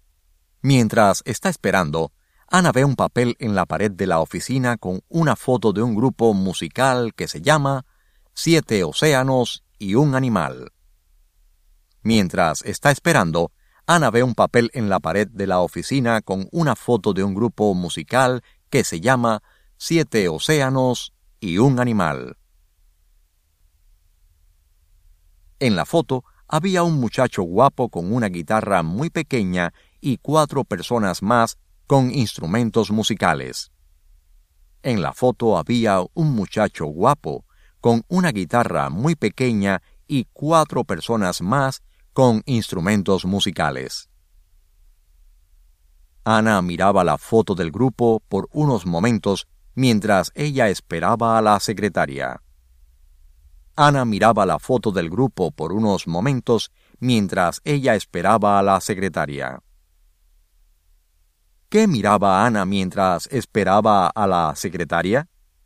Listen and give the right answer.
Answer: Ana miraba la foto del grupo por unos momentos mientras ella esperaba a la secretaria.